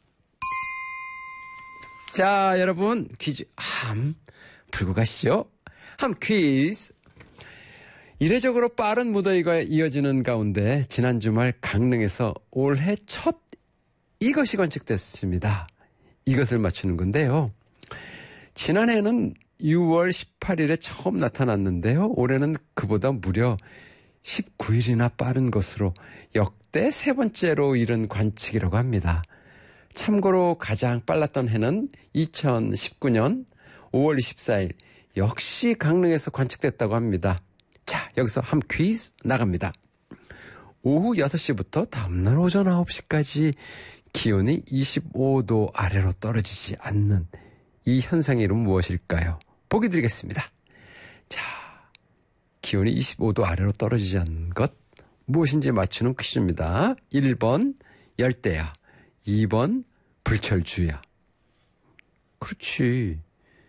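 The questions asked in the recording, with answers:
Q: 오후 6시부터 다음날 오전 9시까지 기온이 25도 아래로 떨어지지 않는 이 현상의 이름은 무엇일까요?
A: 1번: 열대야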